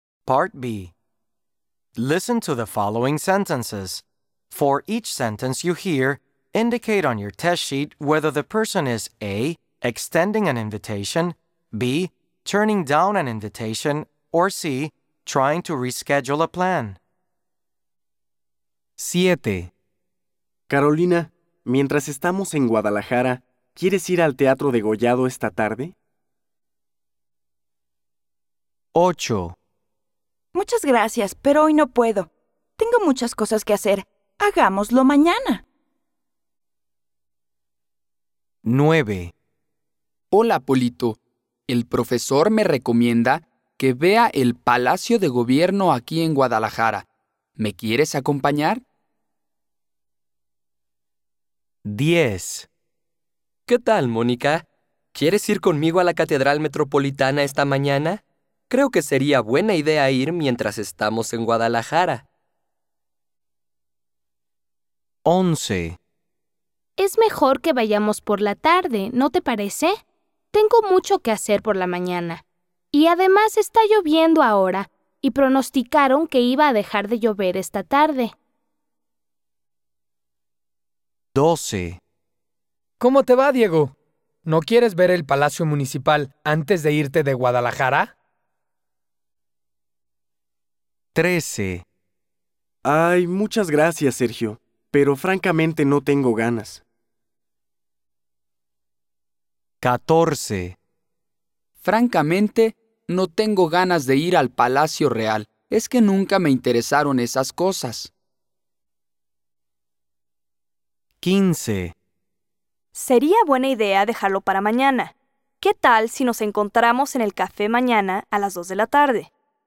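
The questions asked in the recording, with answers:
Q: Carolina, mientras estamos en Guadalajara, ¿quieres ir al Teatro Degollado esta tarde?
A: A: extending an invitation

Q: Hola, Polito. El profesor me recomienda que vea el Palacio de Gobierno aquí en Guadalajara. ¿Me quieres acompañar?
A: A: extending an invitation

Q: ¿Qué tal, Mónica? ¿Quieres ir conmigo a la Catedral Metropolitana esta mañana?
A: A: extending an invitation

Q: Es mejor que vayamos por la tarde, ¿no te parece?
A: C: trying to reschedule a plan

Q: ¿Cómo te va, Diego? ¿No quieres ver el Palacio Municipal antes de irte de Guadalajara?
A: A: extending an invitation

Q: Ay, muchas gracias, Sergio, pero francamente no tengo ganas.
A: B: turning down an invitation

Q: Francamente, no tengo ganas de ir al Palacio Real.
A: B: turning down an invitation

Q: Sería buena idea dejarlo para mañana. ¿Qué tal si nos encontramos en el café mañana a las 2 de la tarde?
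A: C: trying to reschedule a plan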